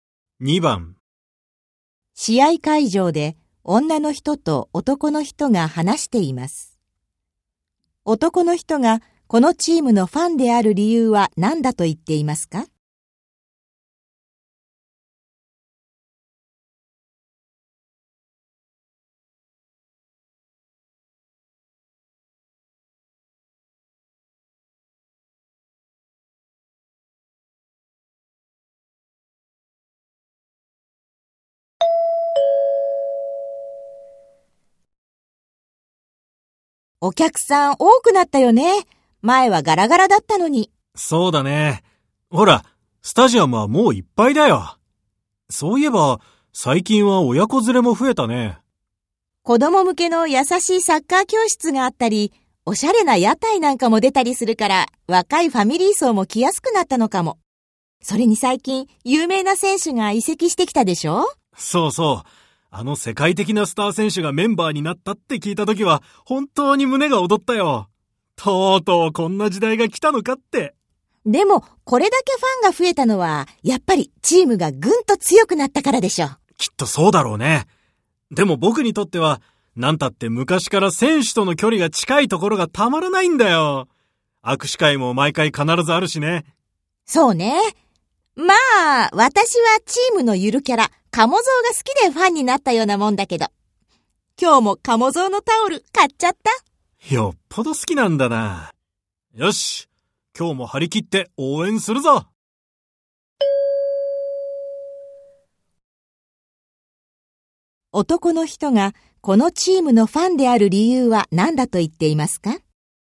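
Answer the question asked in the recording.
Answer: 昔から選手との距離が近いところ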